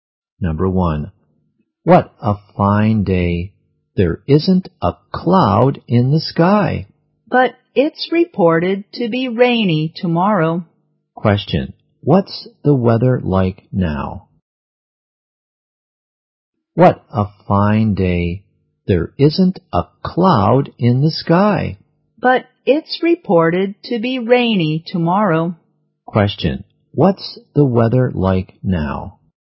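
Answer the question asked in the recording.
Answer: Sunny.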